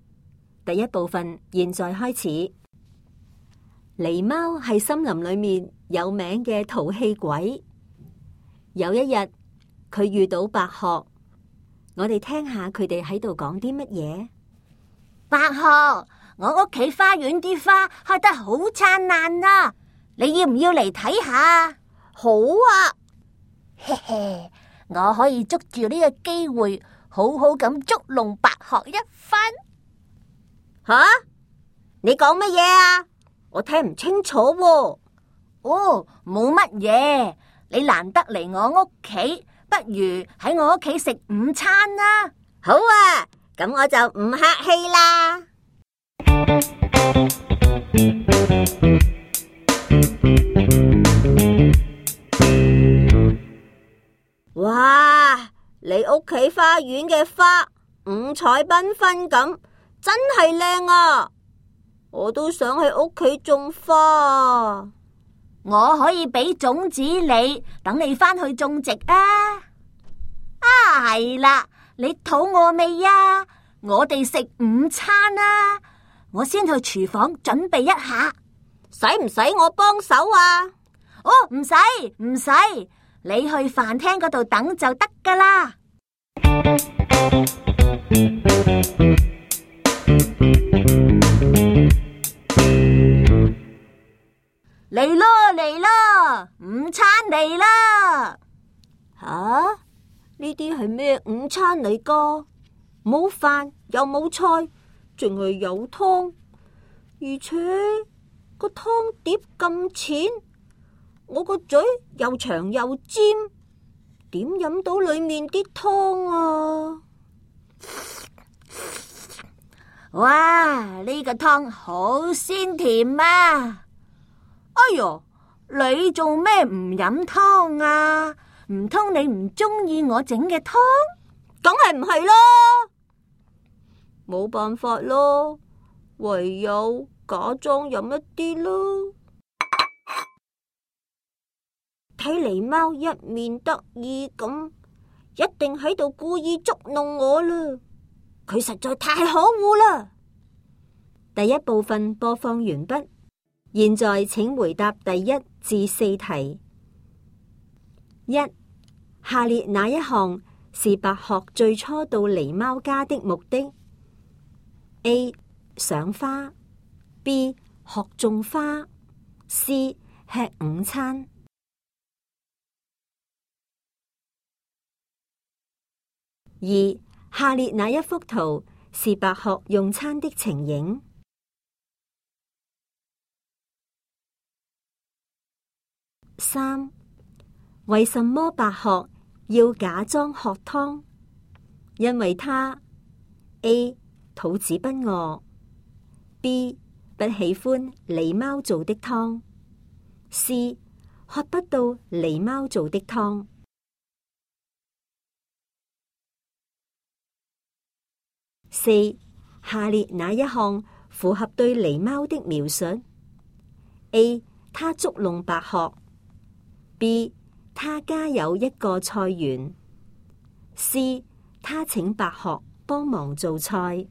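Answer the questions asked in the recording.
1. A: 赏花
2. C: 喝不到狸猫做的汤
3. A: 它捉弄白鹤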